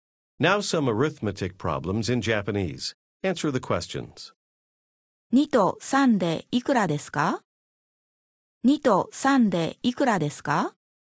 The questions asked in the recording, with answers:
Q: 2と3でいくらですか?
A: 5 2と3で5です。